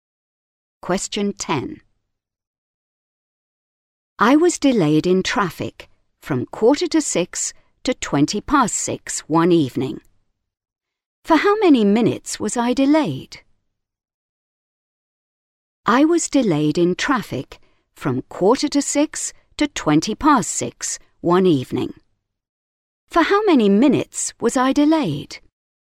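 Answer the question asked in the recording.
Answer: 35 minutes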